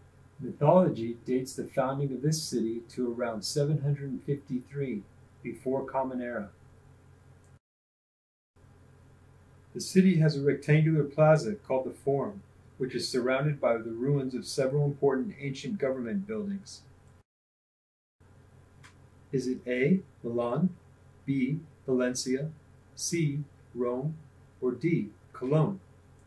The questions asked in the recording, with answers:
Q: Is it A, Milan, B, Valencia, C, Rome, or D, Cologne?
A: If you chose Rome, you're correct.